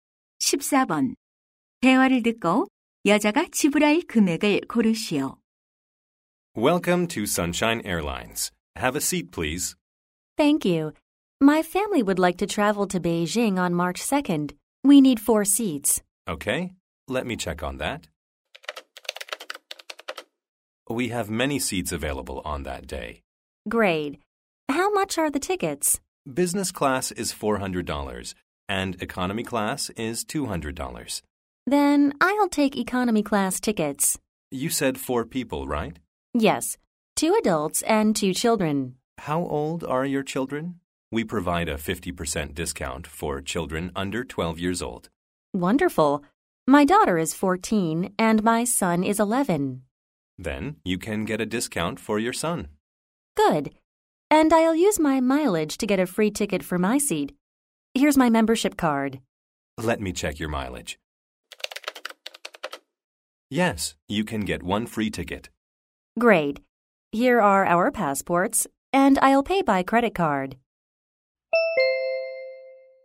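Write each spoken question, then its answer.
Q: 대화를 듣고 여자가 지불할 금액을 고르시오.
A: 500달러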